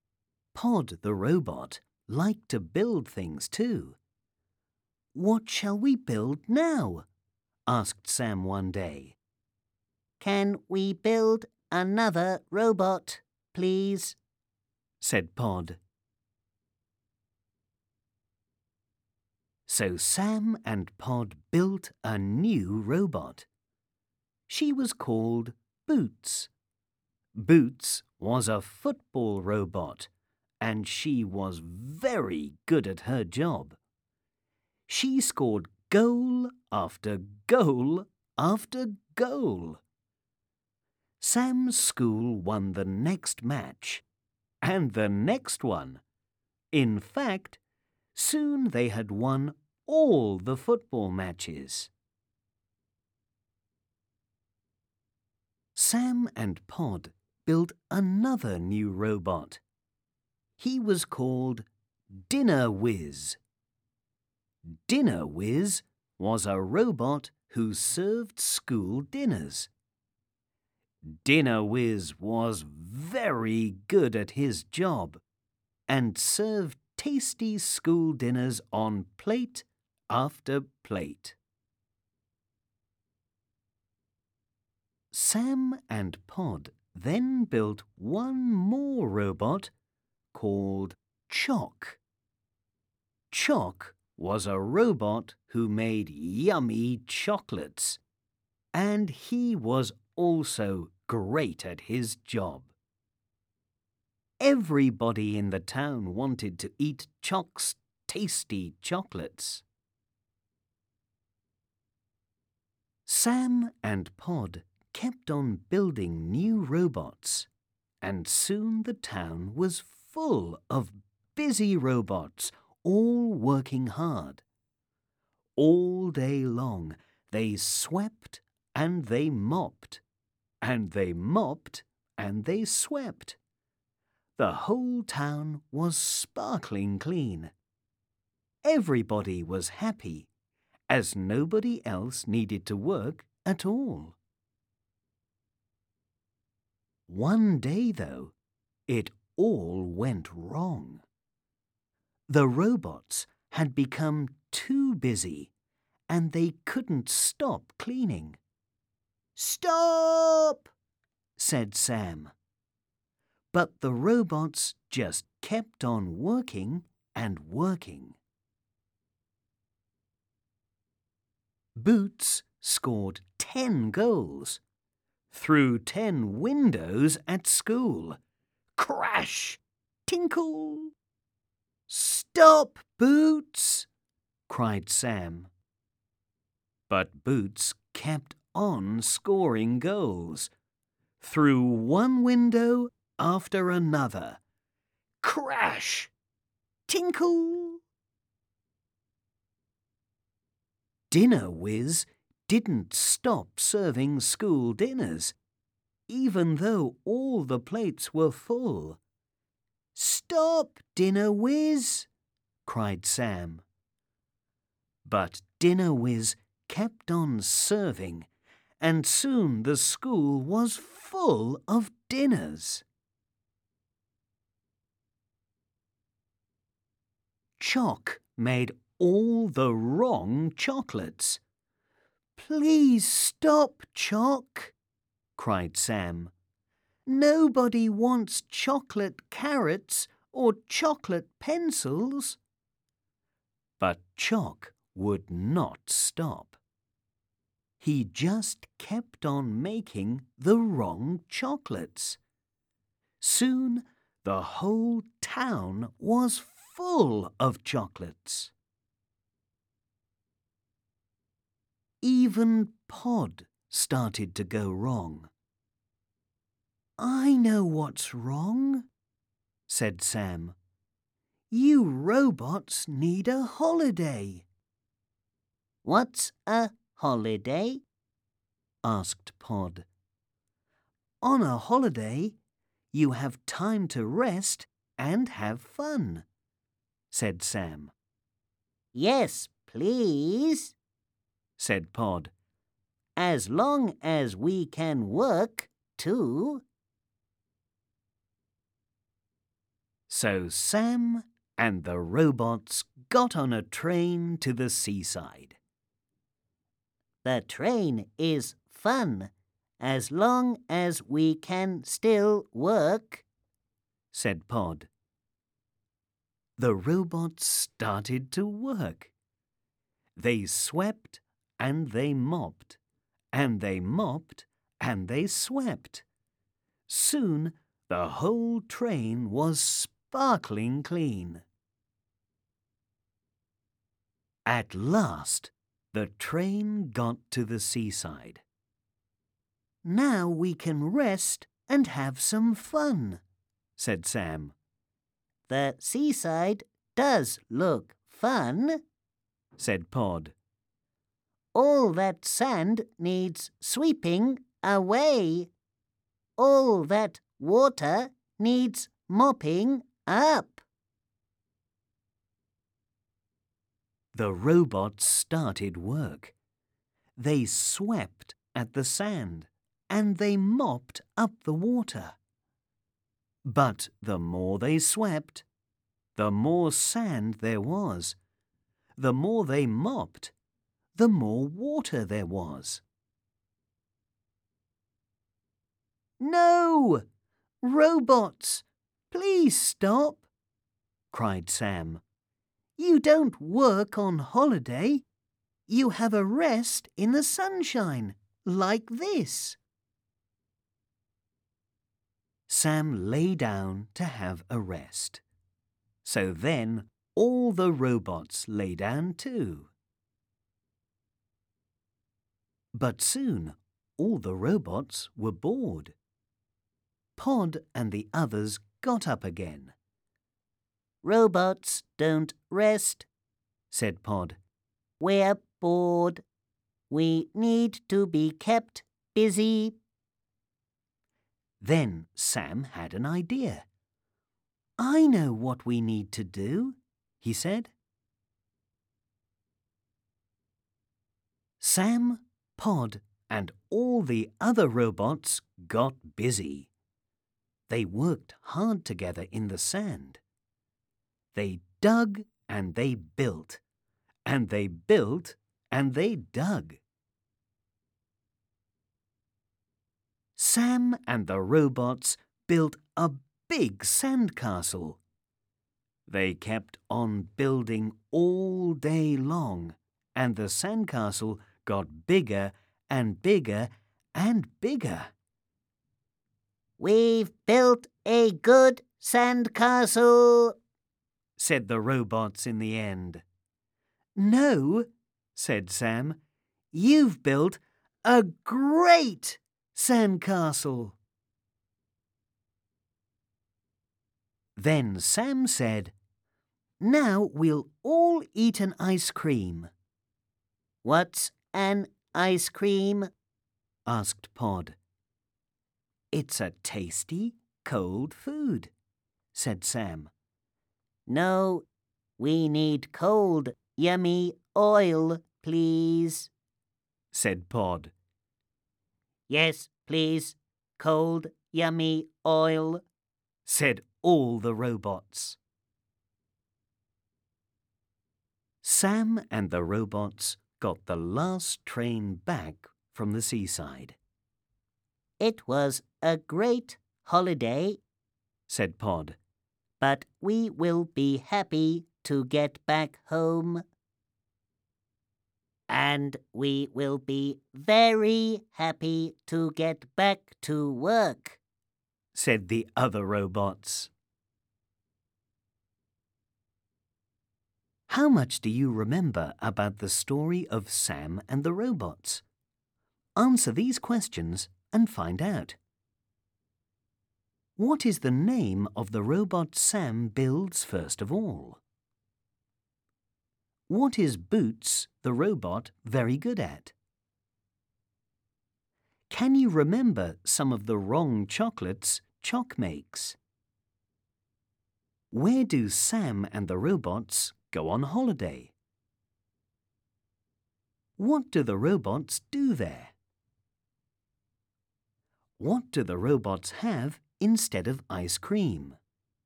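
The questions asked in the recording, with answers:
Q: What is the name of the robot Sam builds first of all?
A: Pod

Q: What is Boots, the robot, very good at?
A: Playing football (scoring goals)

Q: Can you remember some of the wrong chocolates Chock makes?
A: Chocolate carrots and chocolate pencils

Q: Where do Sam and the robots go on holiday?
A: To the seaside

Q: What do the robots do there?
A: They sweep the sand, mop the water, then build a big sandcastle

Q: What do the robots have instead of ice cream?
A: Cold, yummy oil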